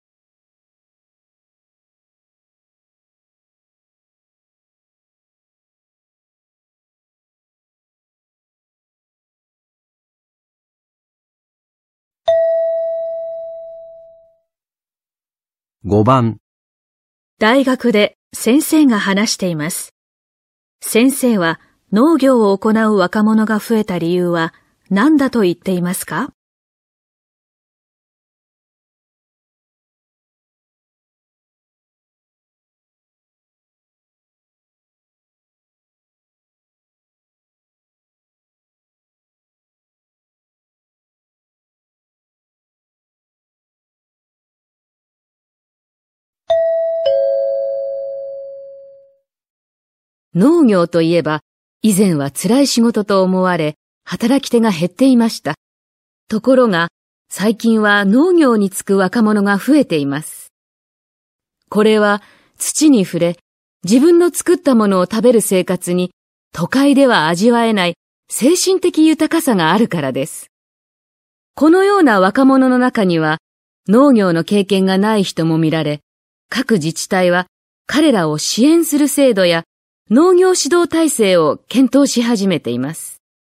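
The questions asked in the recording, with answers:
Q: 先生は農業を行う若者が増えた理由は何だと言っていますか?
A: 都会では味わえない精神的豊かさがあるから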